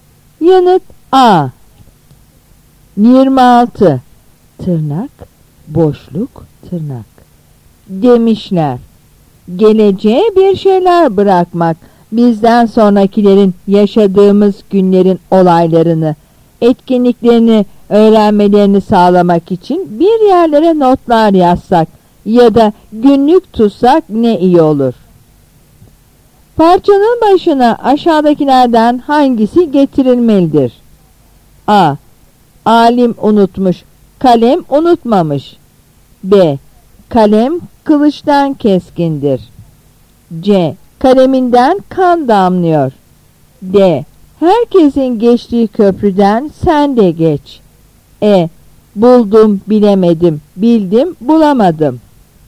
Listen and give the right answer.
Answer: Yanıt A.